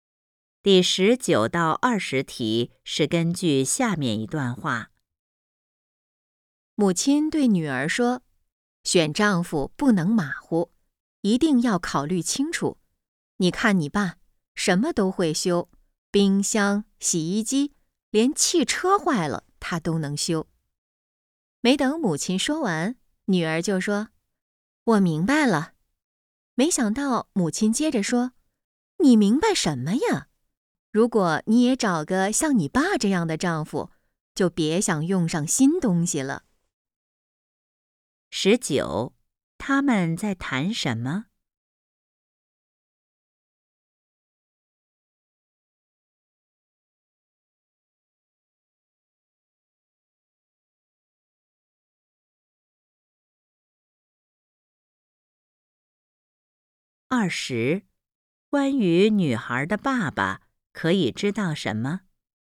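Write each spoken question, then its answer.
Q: 他们在谈什么?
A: 怎么选丈夫

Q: 关于女孩的爸爸可以知道什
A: 他什么都会修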